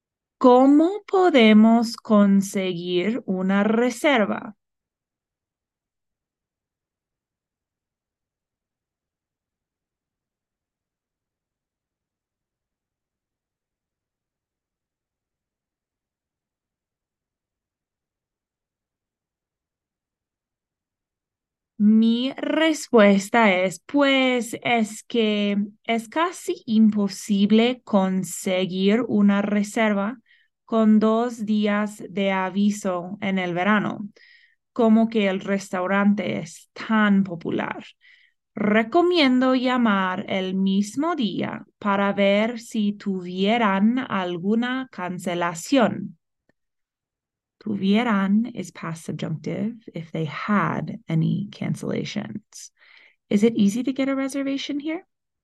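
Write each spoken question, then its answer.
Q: Is it easy to get a reservation here?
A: No, it's almost impossible with two days' notice in summer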